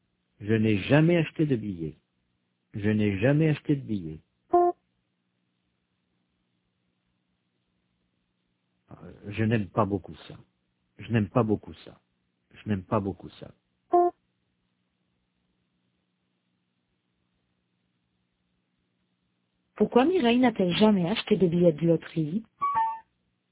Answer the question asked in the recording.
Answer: Parce qu'elle n'aime pas beaucoup ça.